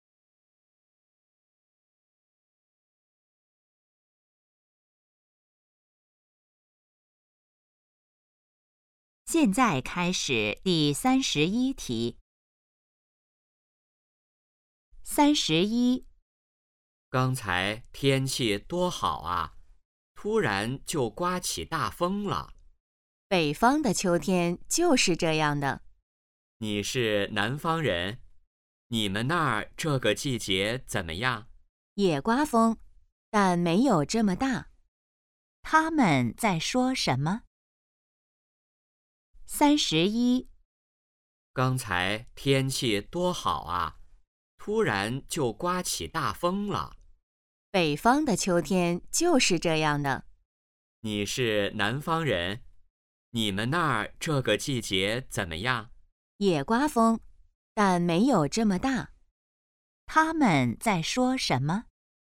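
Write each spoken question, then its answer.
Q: 他们在说什么?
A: 天气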